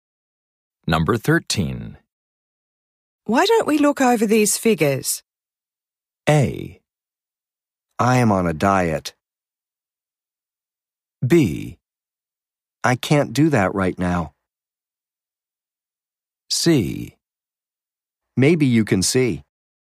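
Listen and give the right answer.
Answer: B: I can't do that right now.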